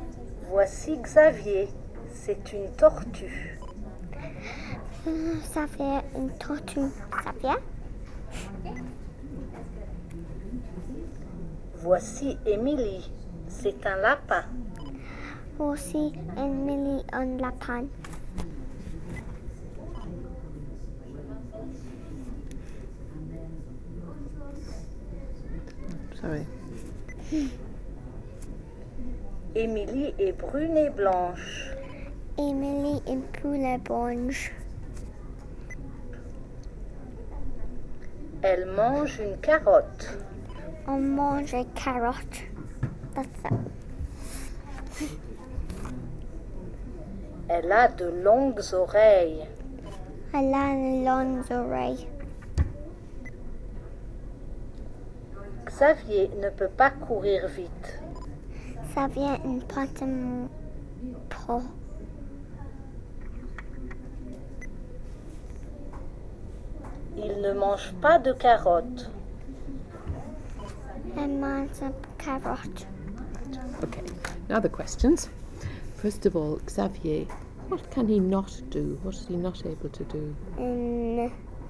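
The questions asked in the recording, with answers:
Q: First of all, Xavier, what can he not do?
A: He can't run fast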